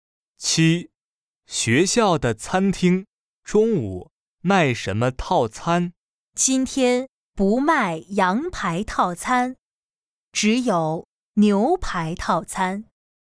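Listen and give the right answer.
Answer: 牛排套餐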